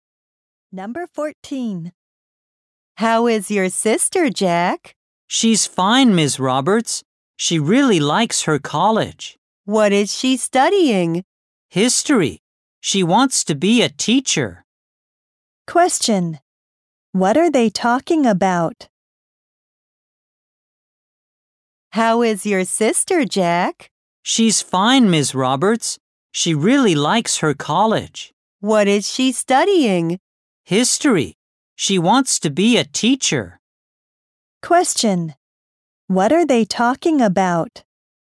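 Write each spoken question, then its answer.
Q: What are they talking about?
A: Jack's sister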